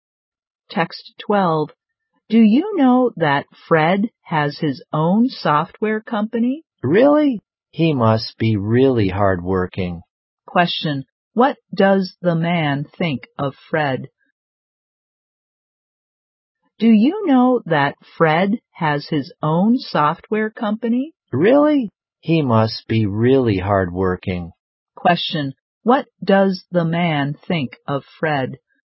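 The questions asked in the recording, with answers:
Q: What does the man think of Fred?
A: He must be really hardworking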